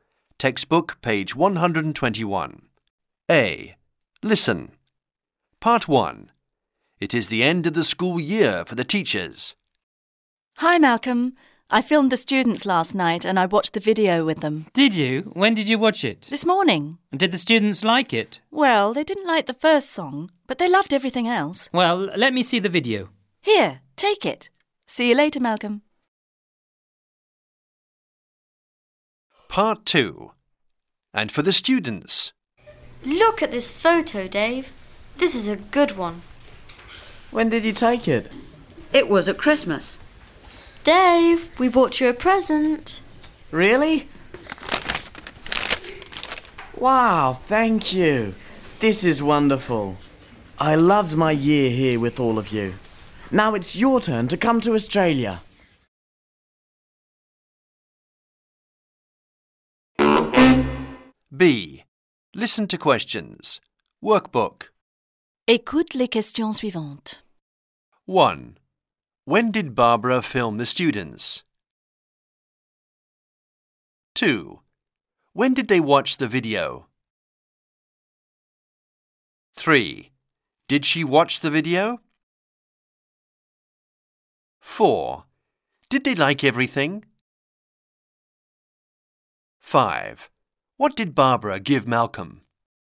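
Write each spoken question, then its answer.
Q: When did Barbara film the students?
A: Last night

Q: When did they watch the video?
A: This morning

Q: Did she watch the video?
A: Yes, she watched it with the students

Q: Did they like everything?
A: No, they didn't like the first song

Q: What did Barbara give Malcolm?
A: The video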